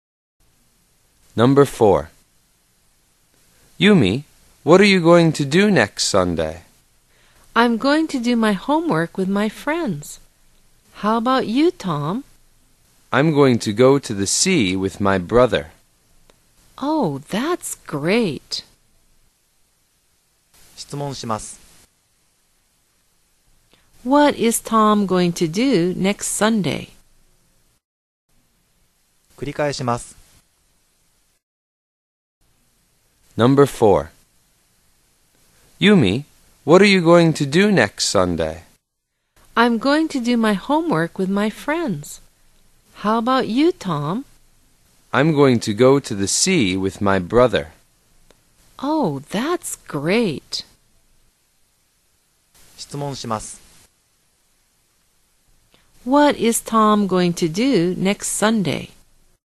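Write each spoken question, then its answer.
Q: What is Tom going to do next Sunday?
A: Go to the sea with his brother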